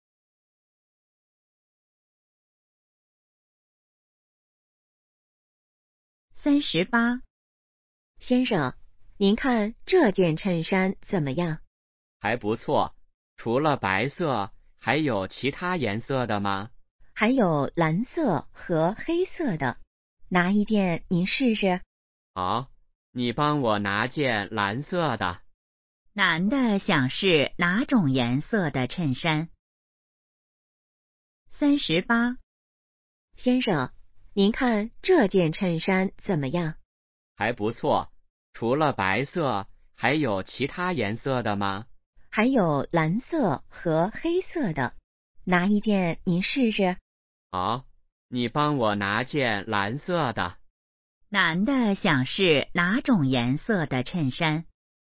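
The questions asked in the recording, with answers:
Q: 男的想试哪种颜色的衬衫?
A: 蓝色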